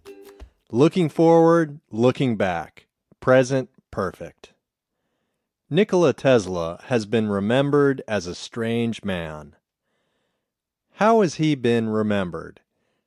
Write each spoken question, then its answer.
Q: How has he been remembered?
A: He has been remembered as a strange man.